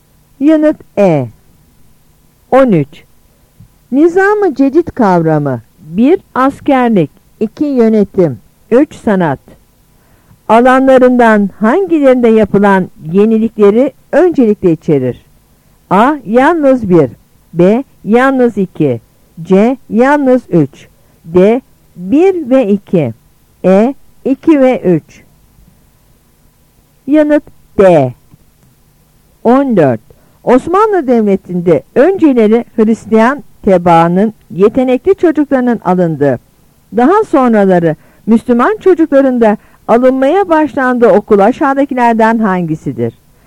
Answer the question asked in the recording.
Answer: Yanıt D.